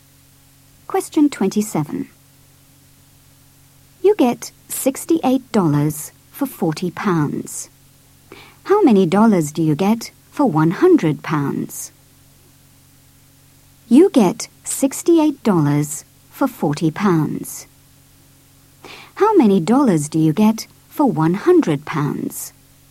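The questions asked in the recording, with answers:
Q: How many dollars do you get for £100?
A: $170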